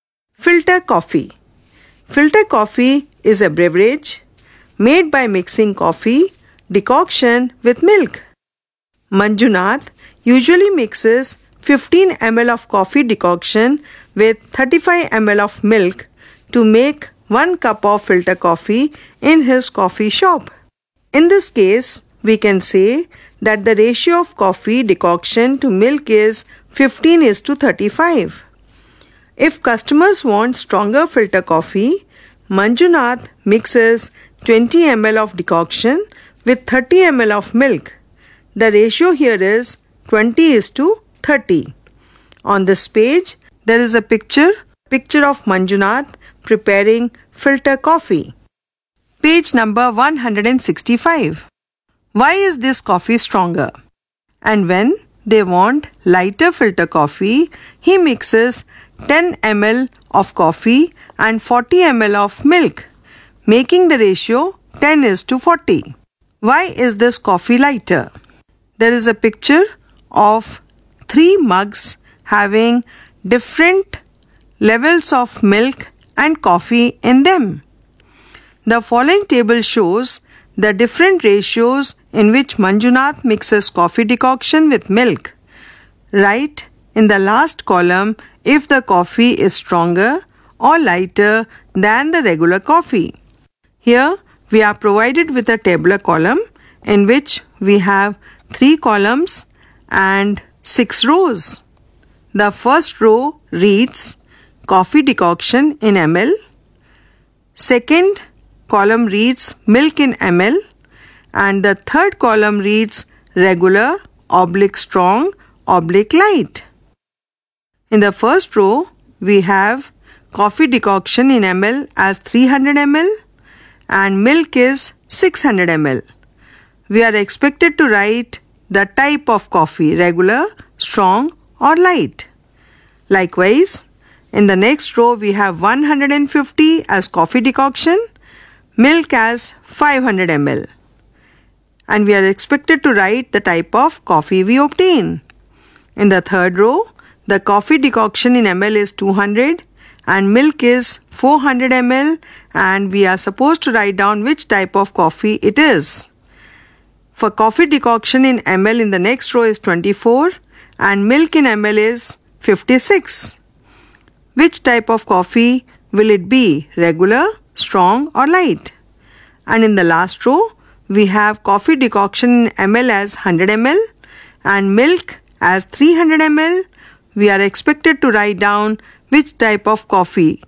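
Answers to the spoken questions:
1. It has more decoction and less milk: 20:30 versus the regular 15:35
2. It has less decoction and more milk: 10:40 versus the regular 15:35
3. Regular (24:56 = 3:7, the same as 15:35)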